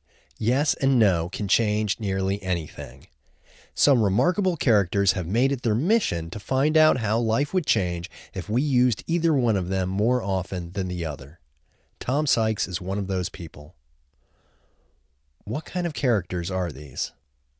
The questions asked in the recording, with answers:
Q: What kind of characters are these?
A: These are remarkable characters.